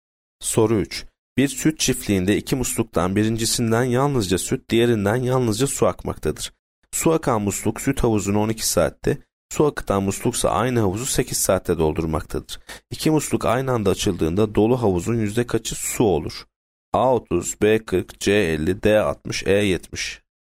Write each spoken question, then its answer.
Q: İki musluk aynı anda açıldığında dolu havuzun yüzde kaçı su olur?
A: Yanıt D 60.